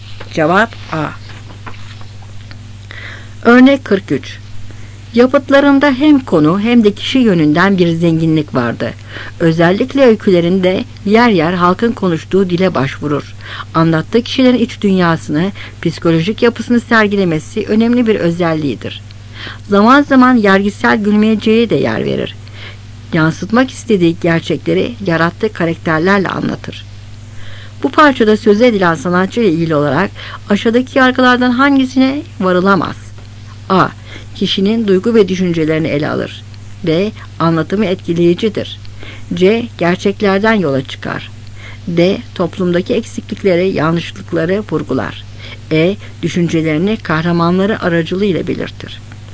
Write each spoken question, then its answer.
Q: Bu parçada söze edilen sanatçı ile ilgili olarak aşağıdaki yargılardan hangisine varılamaz?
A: Cevap B.